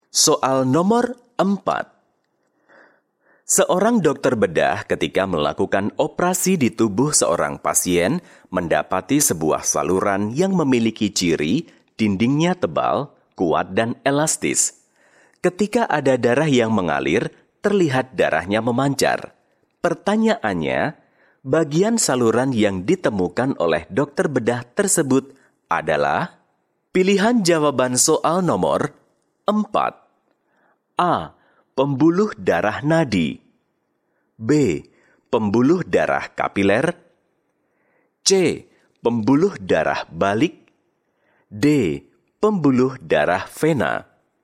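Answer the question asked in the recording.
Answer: A: Pembuluh darah nadi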